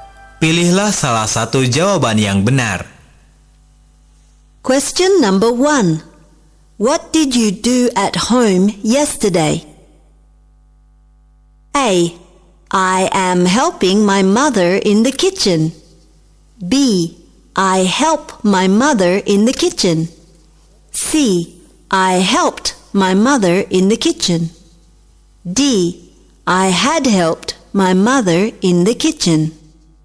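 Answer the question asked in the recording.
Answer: C: I helped my mother in the kitchen.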